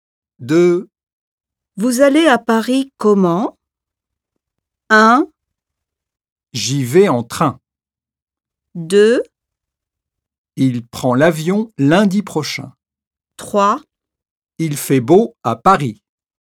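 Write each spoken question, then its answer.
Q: Vous allez à Paris comment?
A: 1: J'y vais en train.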